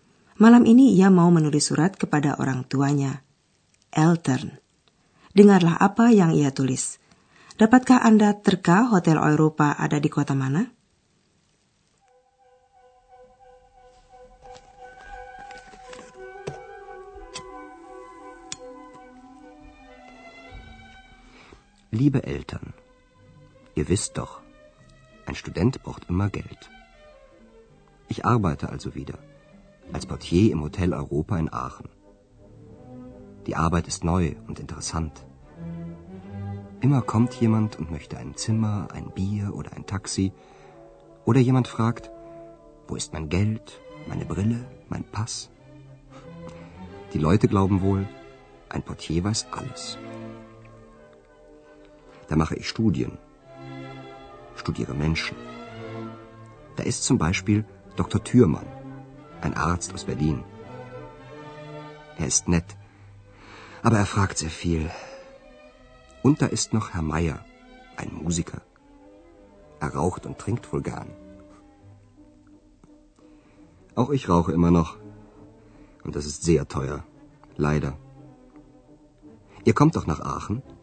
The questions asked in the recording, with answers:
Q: Dapatkah Anda terka Hotel Eropa ada di kota mana?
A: Hotel Europa berada di kota Aachen.